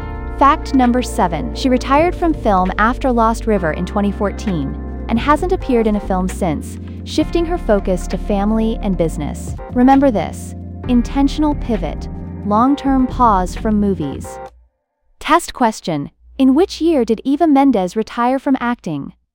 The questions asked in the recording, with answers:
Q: In which year did Eva Mendes retire from acting?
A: Correct answer. 2014.